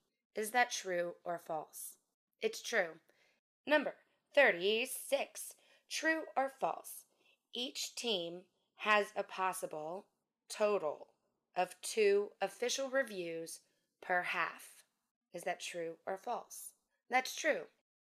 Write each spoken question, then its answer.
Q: Each team has a possible total of 2 official reviews per half.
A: That's true.